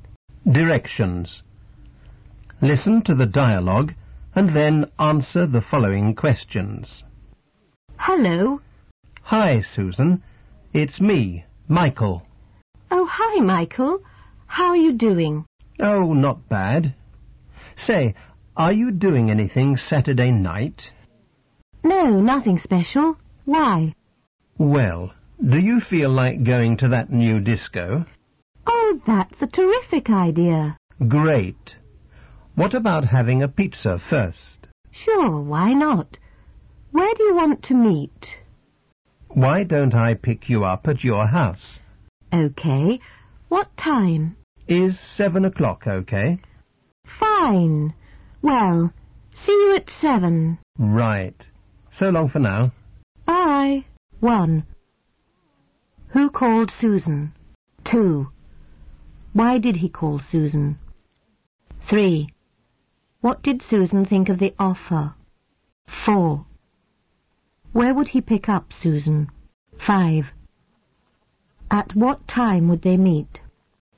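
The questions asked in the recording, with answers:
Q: Who called Susan?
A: Michael

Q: Why did he call Susan?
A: To ask her to go to the new disco on Saturday night

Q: What did Susan think of the offer?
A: She thought it was a terrific idea

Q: Where would he pick up Susan?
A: At her house

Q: At what time would they meet?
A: At 7 o'clock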